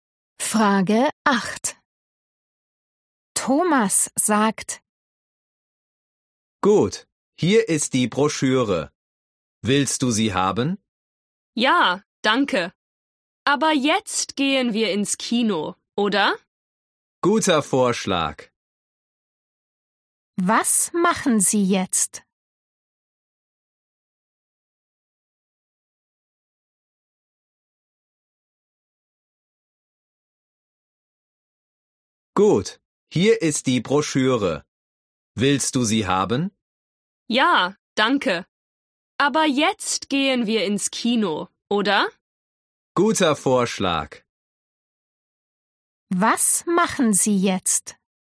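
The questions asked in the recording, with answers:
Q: Was machen Sie jetzt?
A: Sie gehen ins Kino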